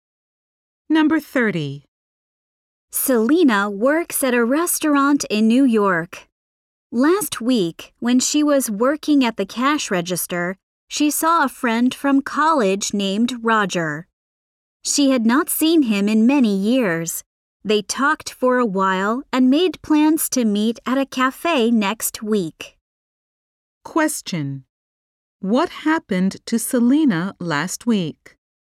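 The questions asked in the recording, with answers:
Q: Question: What happened to Selena last week?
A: She saw a college friend, Roger, at work.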